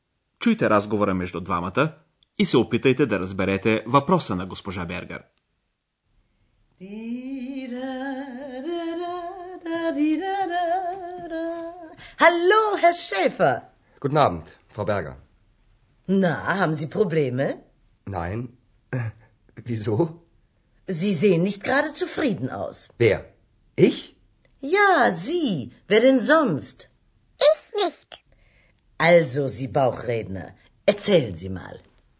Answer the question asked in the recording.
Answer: Госпожа Бергер пита Андреас дали той има някакви проблеми.